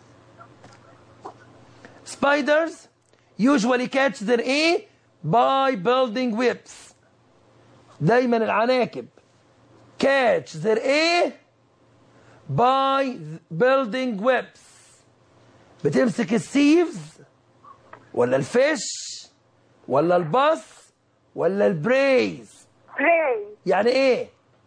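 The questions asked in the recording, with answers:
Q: spiders usually catch their A by building webs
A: D: prey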